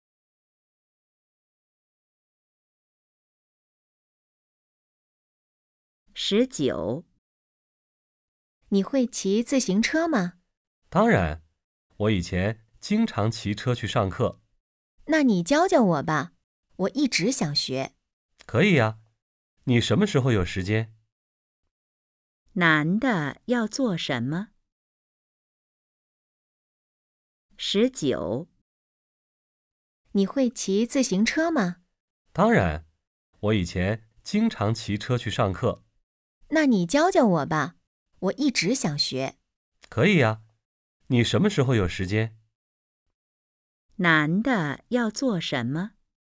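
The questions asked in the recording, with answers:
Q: 男的要做什么?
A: 教女的骑自行车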